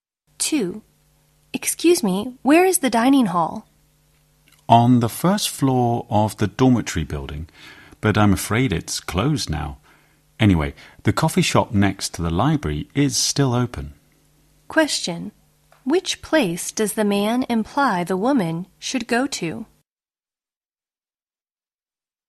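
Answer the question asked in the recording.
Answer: The coffee shop next to the library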